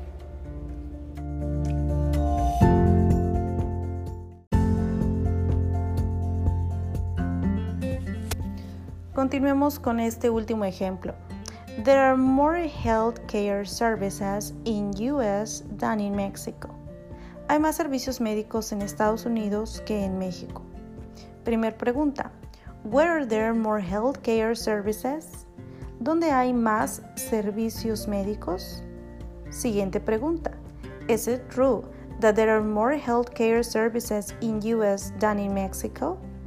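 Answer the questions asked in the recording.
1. In US
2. Yes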